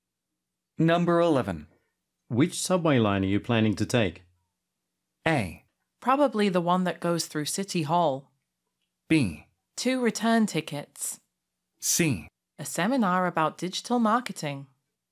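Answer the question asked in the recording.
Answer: A: Probably the one that goes through City Hall.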